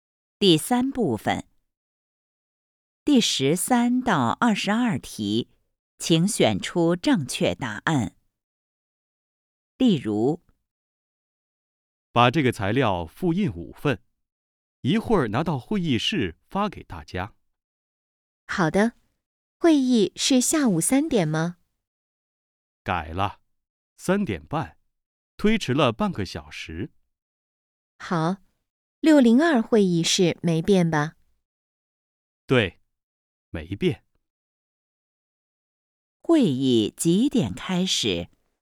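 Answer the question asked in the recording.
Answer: 三点半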